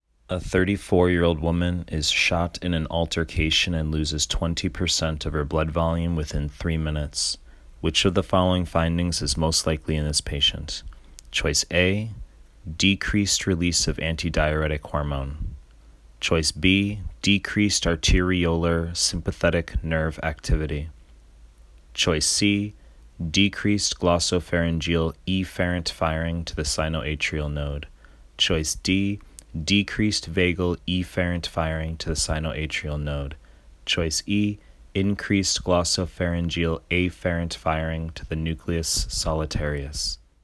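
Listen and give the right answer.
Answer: D: decreased vagal efferent firing to the sinoatrial node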